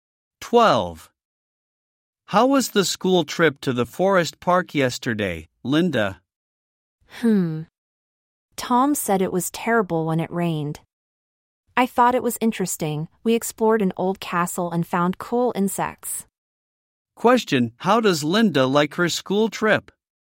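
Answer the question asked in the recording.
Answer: She thought it was interesting.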